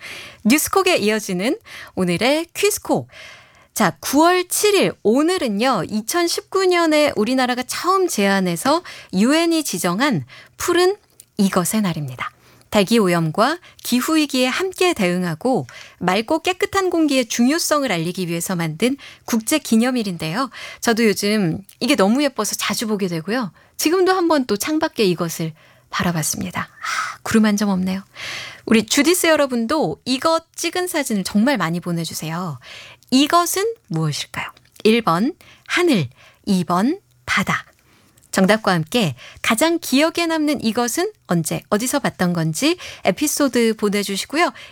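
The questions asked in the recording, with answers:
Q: 이것은 무엇일까요? 1번 하늘, 2번 바다.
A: 1: 하늘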